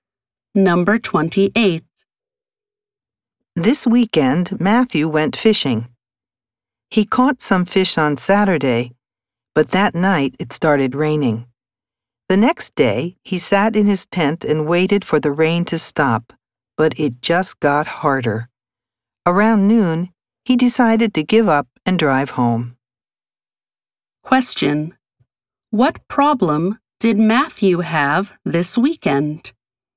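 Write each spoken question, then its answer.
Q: What problem did Matthew have this weekend?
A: It rained hard, so he had to give up fishing and go home.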